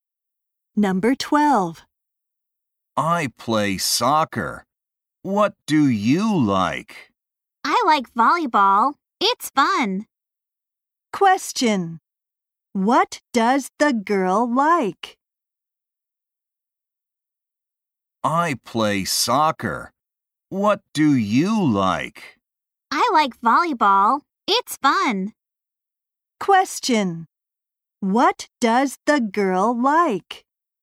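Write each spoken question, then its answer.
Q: What does the girl like?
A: Volleyball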